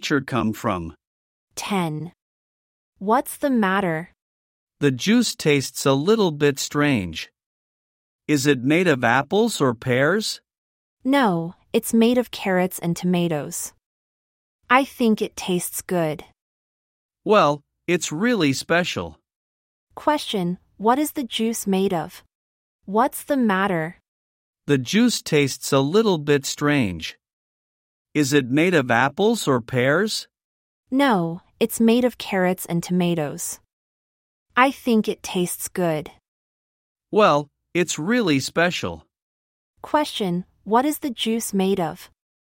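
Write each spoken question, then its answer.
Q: Question, what is the juice made of?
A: Carrots and tomatoes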